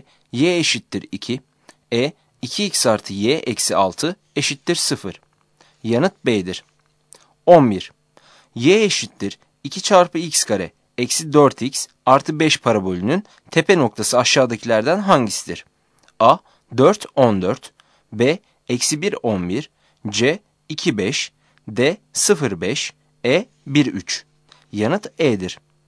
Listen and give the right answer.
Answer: Yanıt E'dir.